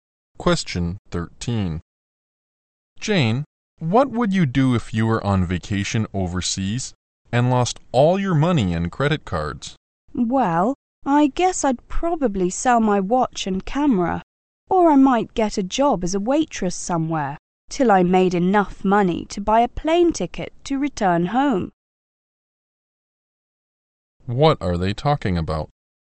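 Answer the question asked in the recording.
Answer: What to do if they lost all their money on vacation overseas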